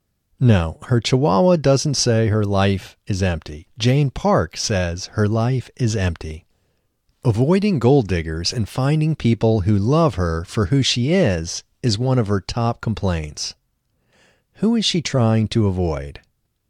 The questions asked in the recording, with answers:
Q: Who is she trying to avoid?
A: She is trying to avoid gold diggers.